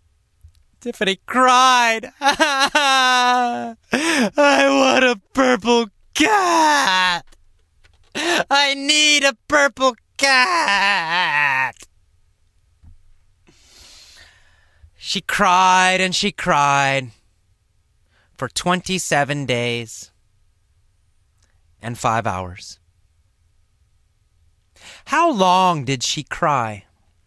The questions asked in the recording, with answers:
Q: How long did she cry?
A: Well, she cried for 27 days and 5 hours.